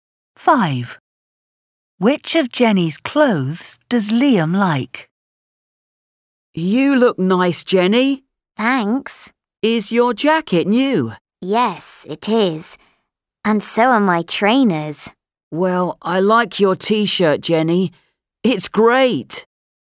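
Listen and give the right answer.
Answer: her T-shirt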